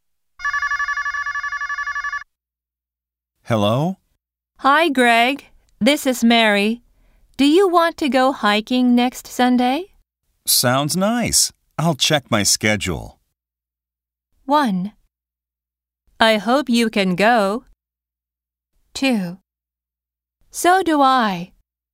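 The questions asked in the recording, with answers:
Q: 1. I hope you can go. 2. So do I. 3. I think so.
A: 1: I hope you can go.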